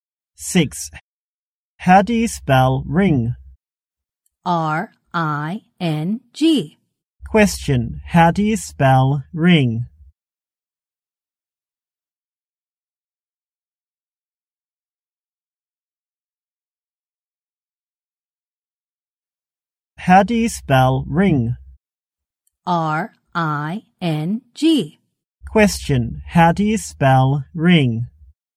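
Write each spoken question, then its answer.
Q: Question, how do you spell ring?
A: R-I-N-G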